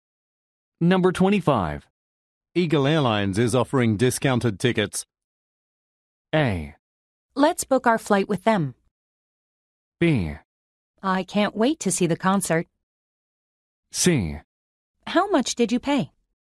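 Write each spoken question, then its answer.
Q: Eagle Airlines is offering discounted tickets.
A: A: Let's book our flight with them.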